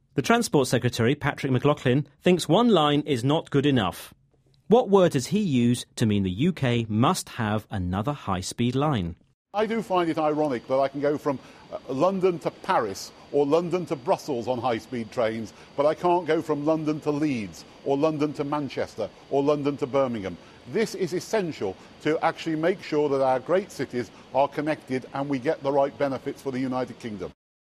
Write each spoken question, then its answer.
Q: What word does he use to mean the UK must have another high-speed line?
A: He used the word essential to mean a new line to connect British cities has to be built.